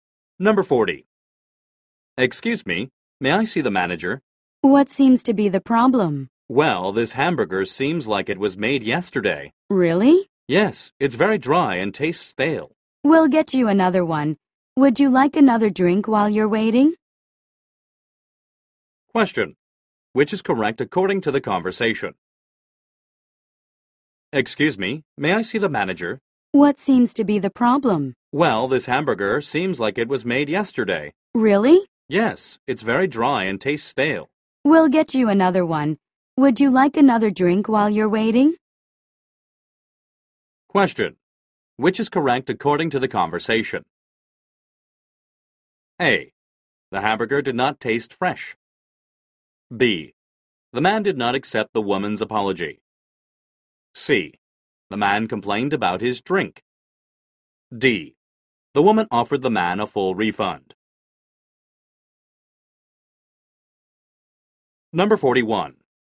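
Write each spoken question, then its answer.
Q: Which is correct according to the conversation?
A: A: The hamburger did not taste fresh.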